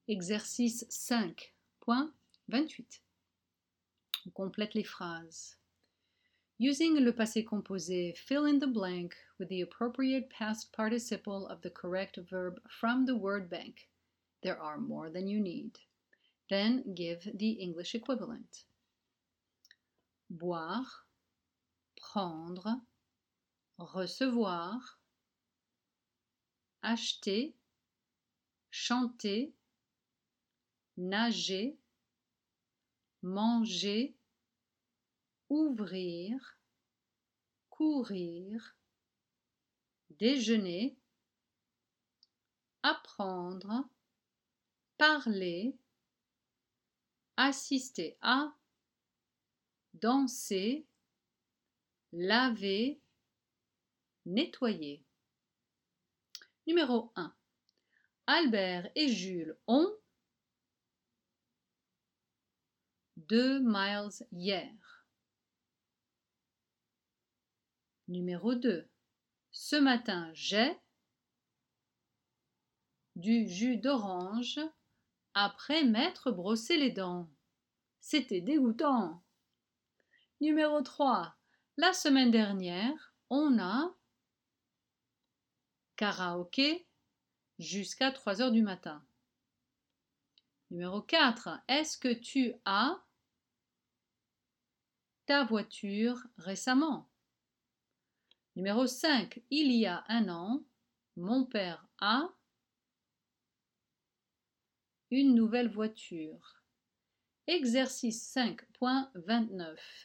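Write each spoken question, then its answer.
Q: Albert et Jules ont 2 miles hier.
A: couru

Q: Ce matin, j'ai du jus d'orange après m'être brossé les dents.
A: bu

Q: La semaine dernière, on a karaoké jusqu'à 3 heures du matin.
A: chanté

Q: Il y a un an, mon père a une nouvelle voiture.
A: acheté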